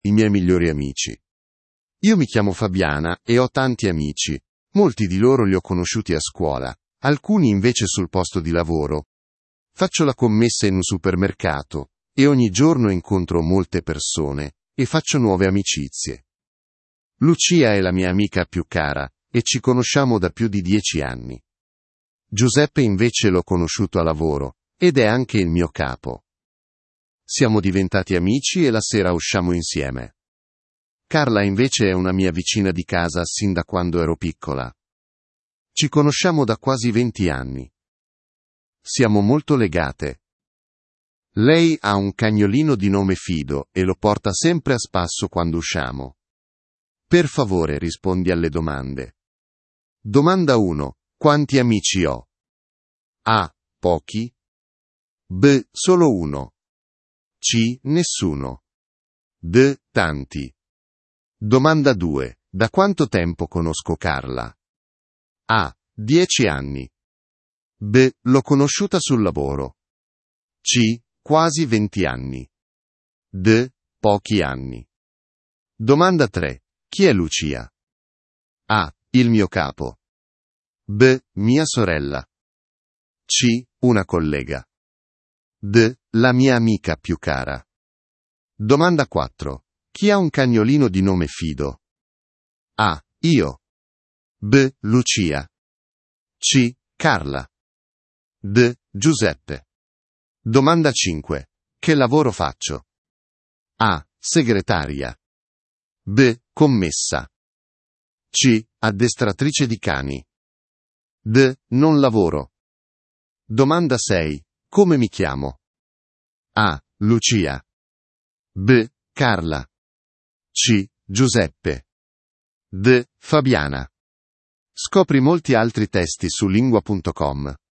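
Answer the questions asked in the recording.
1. D: Tanti
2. C: Quasi 20 anni
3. D: La mia amica più cara
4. C: Carla
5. B: Commessa
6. D: Fabiana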